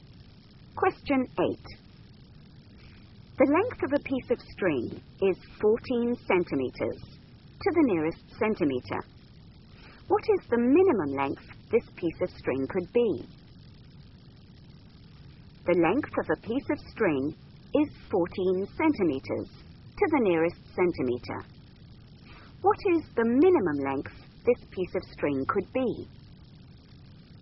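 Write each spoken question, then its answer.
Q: What is the minimum length this piece of string could be?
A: 13.5 cm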